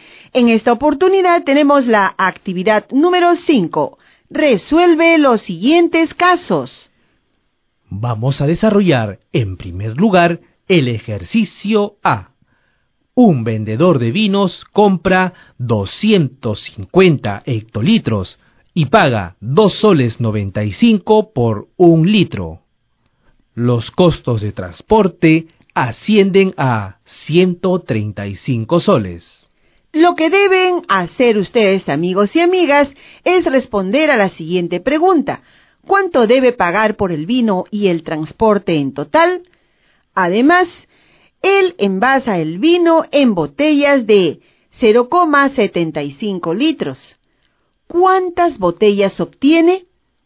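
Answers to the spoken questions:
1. 73 885 soles
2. 33 333 botellas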